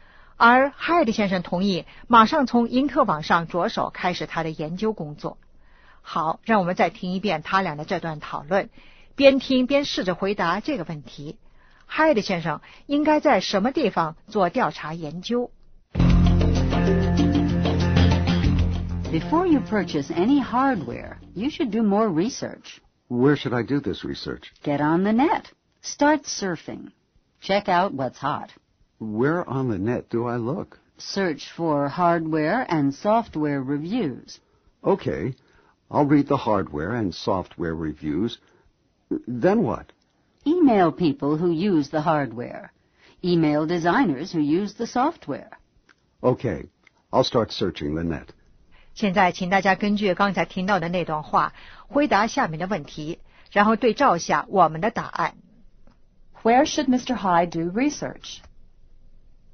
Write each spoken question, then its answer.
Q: Where should Mr. Hyde do research?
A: On the net.